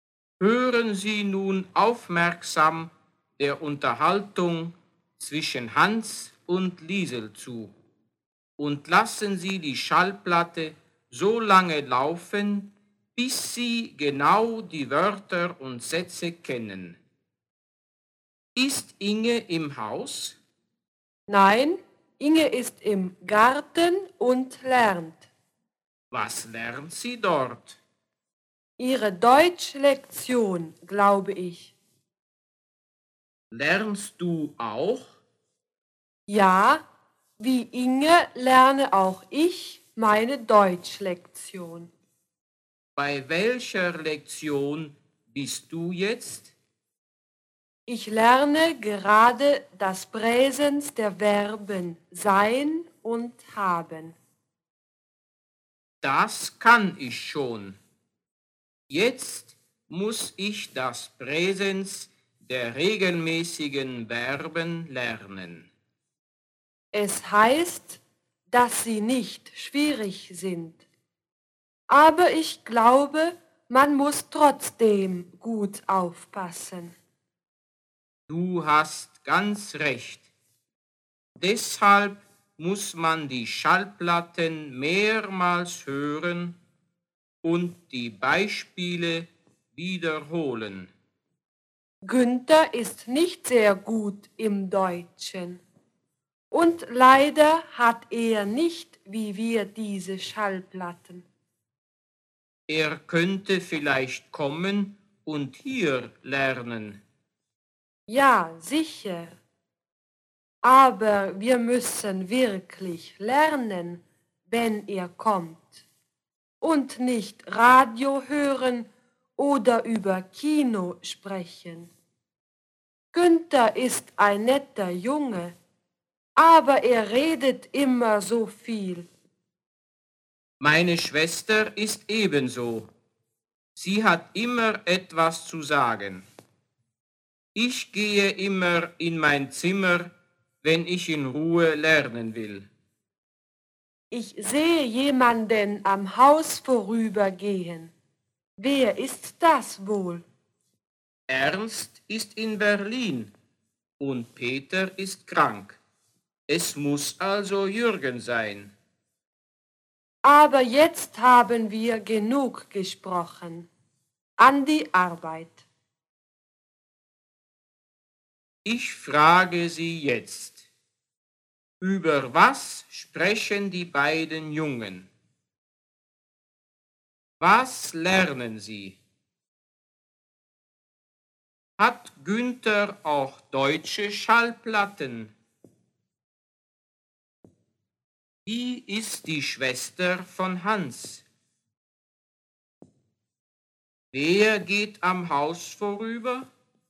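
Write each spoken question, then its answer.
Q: über was sprechen die beiden Jungen?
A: Über das Deutschlernen (ihre Deutschlektion)

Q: Was lernen Sie?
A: Ihre Deutschlektion (das Präsens der Verben)

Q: Hat Günther auch deutsche Schallplatten?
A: Nein, er hat keine Schallplatten.

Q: Wer geht am Haus vorüber?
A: Jürgen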